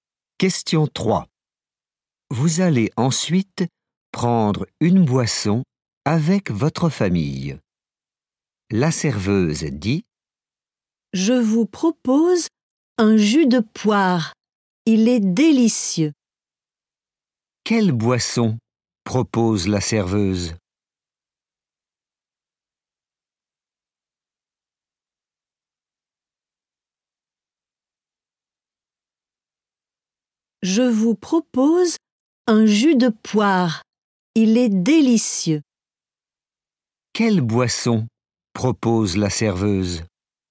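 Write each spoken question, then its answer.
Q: Quelle boisson propose la serveuse?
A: un jus de poire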